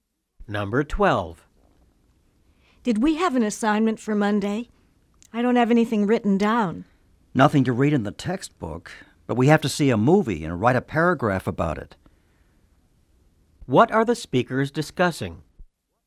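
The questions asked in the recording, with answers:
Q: What are the speakers discussing?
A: An assignment for Monday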